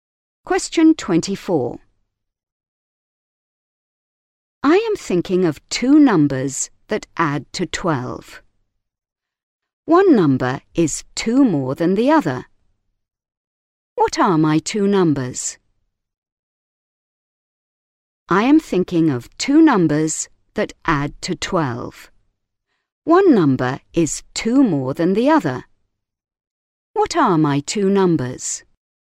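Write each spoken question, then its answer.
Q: What are my 2 numbers?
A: 5 and 7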